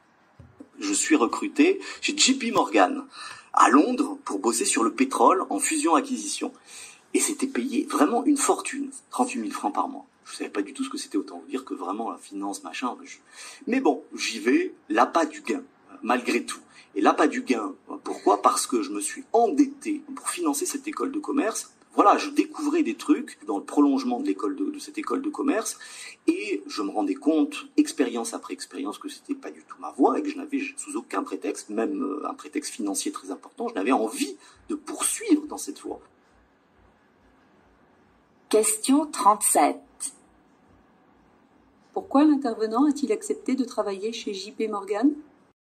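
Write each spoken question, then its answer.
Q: Pourquoi l'intervenant a-t-il accepté de travailler chez JP Morgan ?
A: Pour l'argent : il s'était endetté pour financer son école de commerce.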